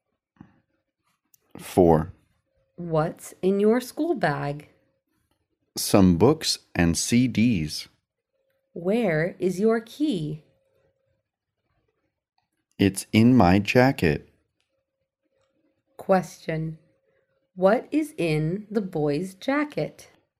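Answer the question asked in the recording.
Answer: His key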